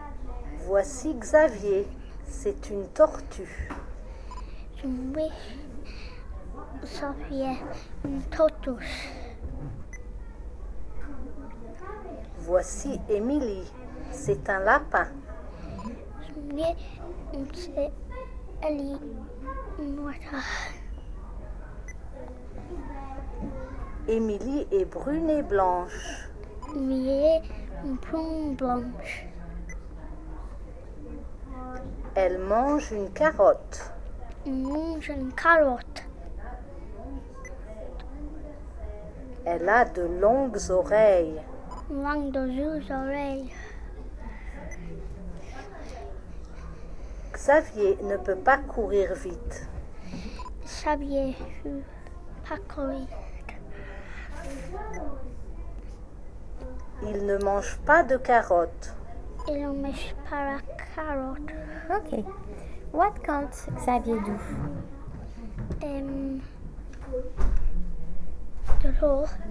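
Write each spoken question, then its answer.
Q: What can't Xavier do?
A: Run fast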